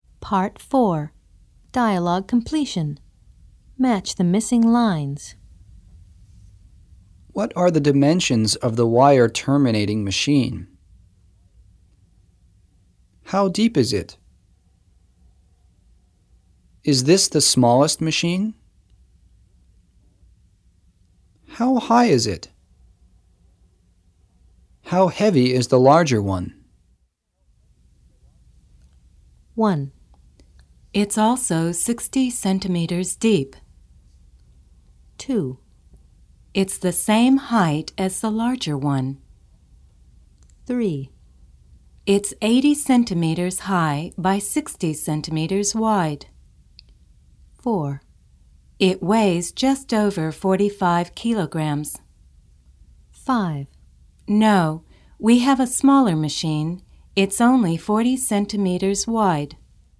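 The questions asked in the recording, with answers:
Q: What are the dimensions of the wire terminating machine?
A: 3: It's 80 centimeters high by 60 centimeters wide.

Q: How deep is it?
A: 1: It's also 60 centimeters deep.

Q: Is this the smallest machine?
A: 5: No, we have a smaller machine. It's only 40 centimeters wide.

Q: How high is it?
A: 2: It's the same height as the larger one.

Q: How heavy is the larger one?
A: 4: It weighs just over 45 kilograms.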